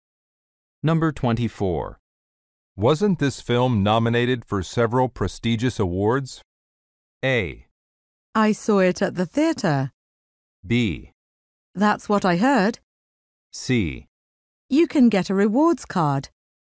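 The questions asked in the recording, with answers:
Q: Wasn't this film nominated for several prestigious awards?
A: B: That's what I heard.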